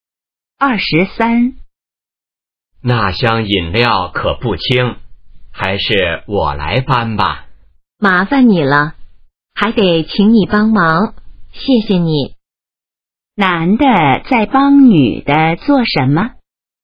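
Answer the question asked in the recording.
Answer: 搬饮料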